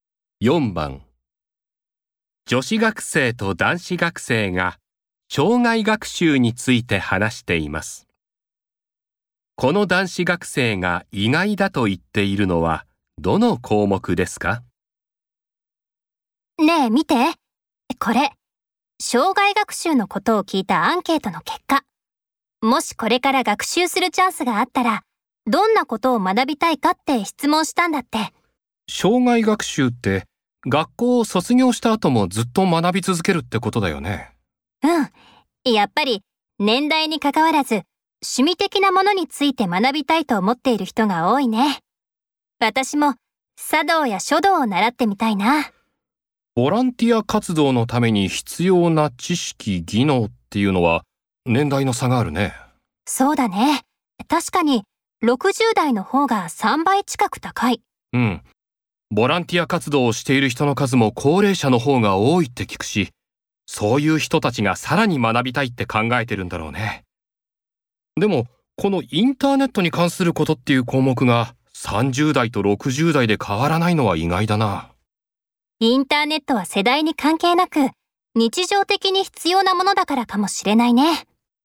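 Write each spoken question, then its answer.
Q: この男子学生が意外だと言っているのはどの項目ですか?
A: インターネットに関すること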